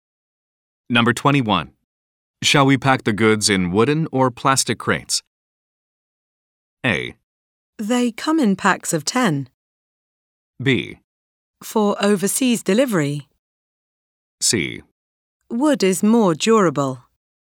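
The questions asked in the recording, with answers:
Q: Shall we pack the goods in wooden or plastic crates?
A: C: Wood is more durable.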